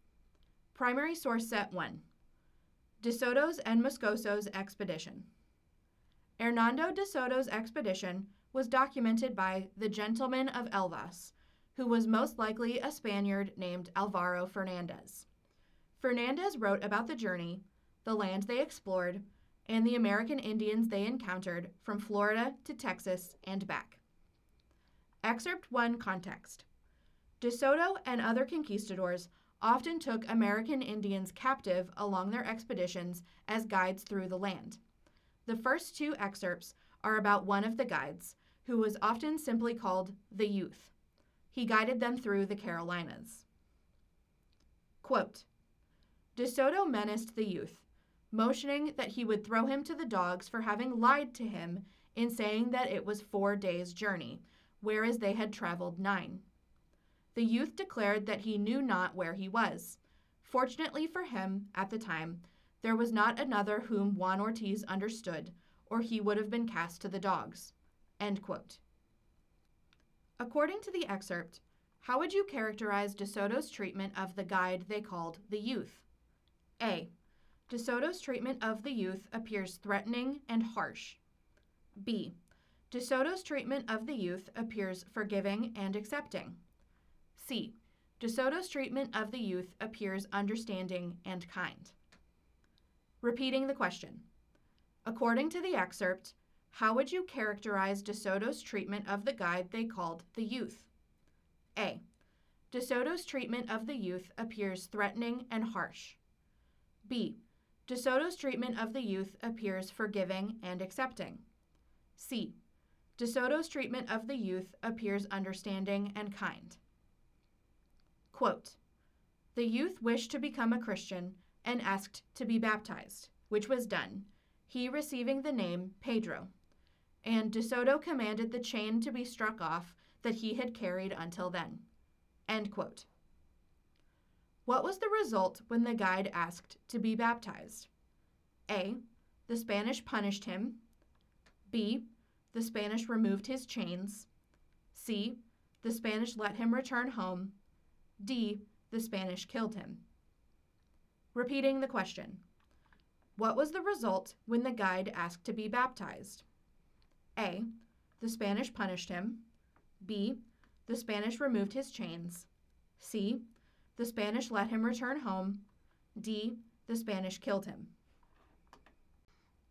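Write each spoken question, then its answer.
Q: According to the excerpt, how would you characterize De Soto's treatment of the guide they called the Youth?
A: A: De Soto's treatment of the Youth appears threatening and harsh.

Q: What was the result when the guide asked to be baptized?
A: B: The Spanish removed his chains.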